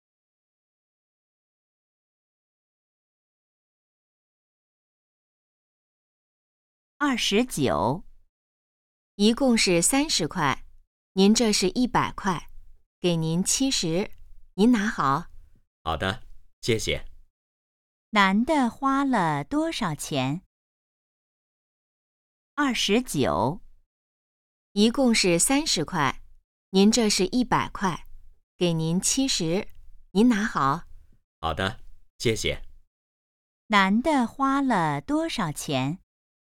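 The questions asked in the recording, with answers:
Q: 男的花了多少钱?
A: 30块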